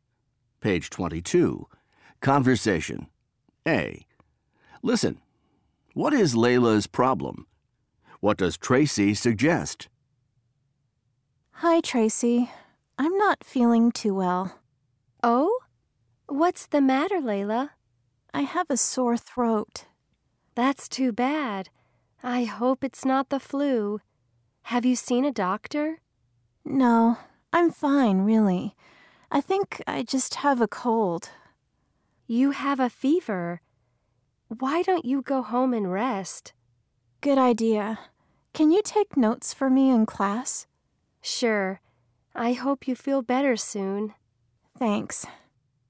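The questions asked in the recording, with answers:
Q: What is Layla's problem?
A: She has a sore throat (and a fever).

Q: What does Tracy suggest?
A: She suggests Layla go home and rest.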